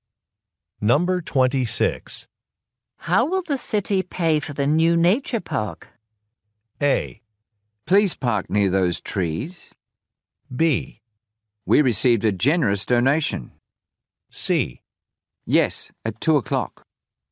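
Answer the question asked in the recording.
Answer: B: We received a generous donation.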